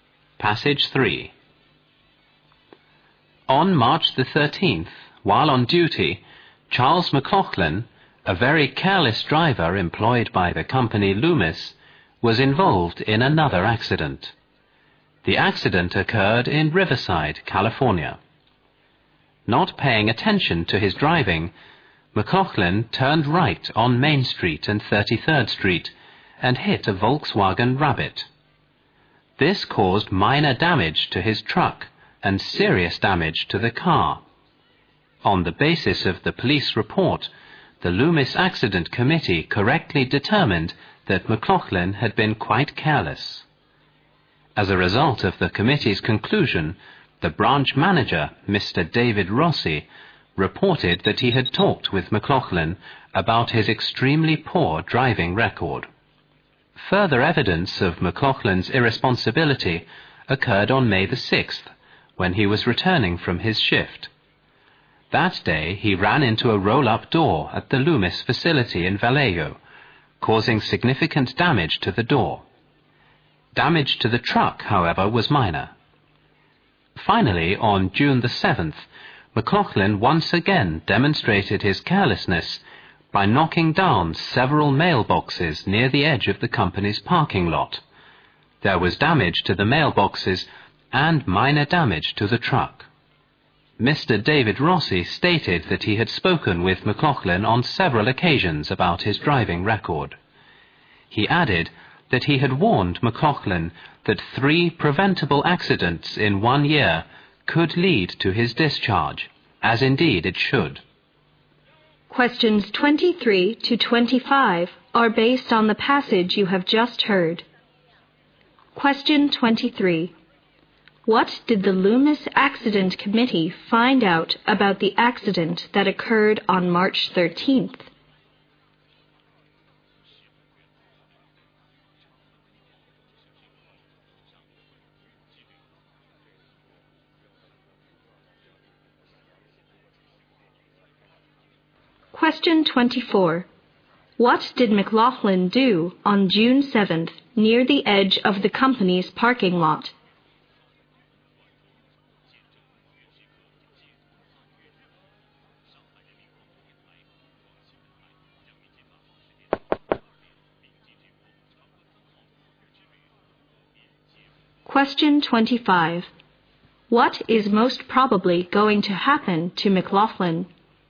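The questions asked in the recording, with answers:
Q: What did the Loomis Accident Committee find out about the accident that occurred on March 13th?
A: McLaughlin had been careless

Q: What did McLaughlin do on June 7th near the edge of the company's parking lot?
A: He knocked down several mailboxes

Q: What is most probably going to happen to McLaughlin?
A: He will be fired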